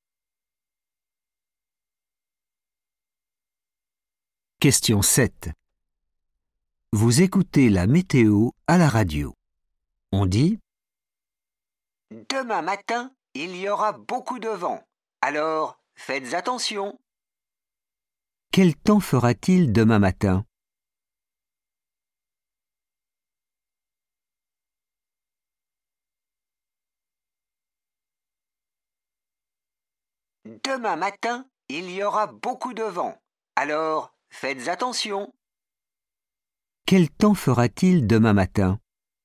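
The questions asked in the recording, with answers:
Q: Quel temps fera-t-il demain matin ?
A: beaucoup de vent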